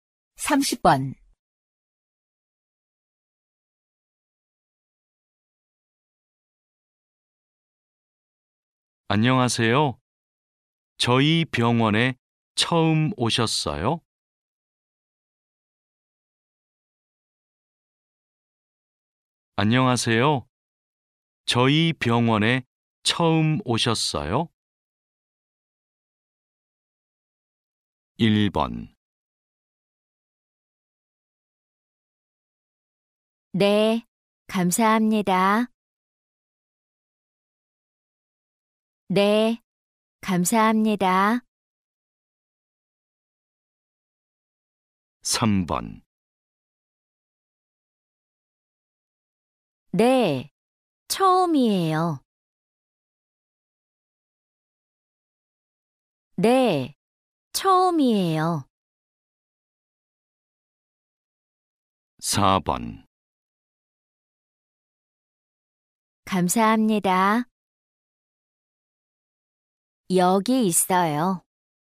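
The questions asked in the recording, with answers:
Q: 안녕하세요. 저희 병원에 처음 오셨어요?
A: 3: 네, 처음이에요.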